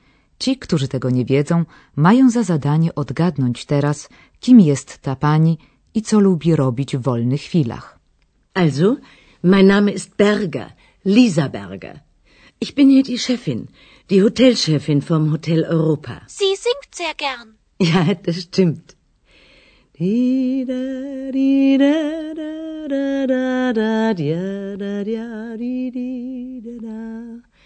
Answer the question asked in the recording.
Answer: jest szefową hotelu Europa w Aachen, gdzie rozgrywa się większa część naszego kursu.